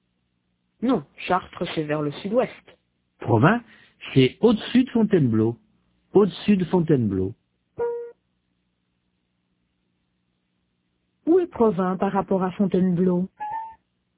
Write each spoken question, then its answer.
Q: Où est Provins par rapport à Fontainebleau?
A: Au-dessus.